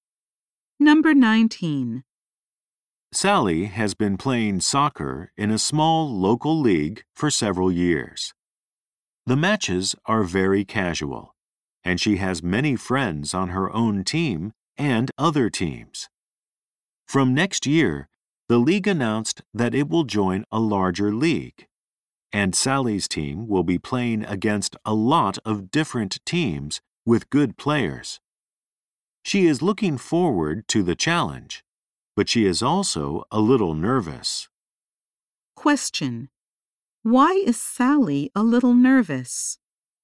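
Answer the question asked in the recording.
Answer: Her team will play against many different teams with good players.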